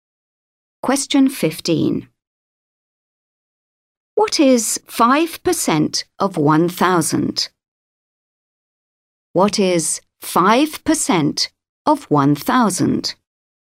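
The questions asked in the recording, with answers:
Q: What is 5% of 1,000?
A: 50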